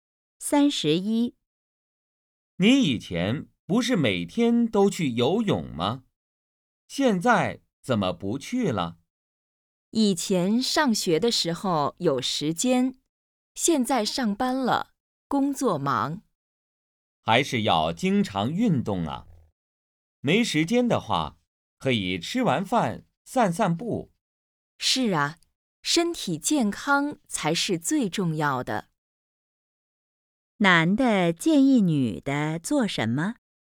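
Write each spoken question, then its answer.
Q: 男的建议女的做什么?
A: 吃完饭散步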